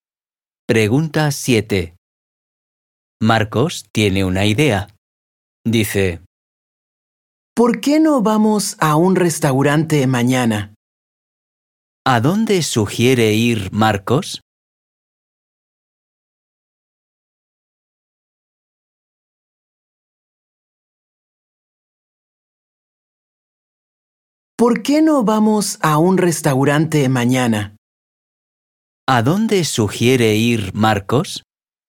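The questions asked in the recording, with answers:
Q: ¿A dónde sugiere ir Marcos?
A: a un restaurante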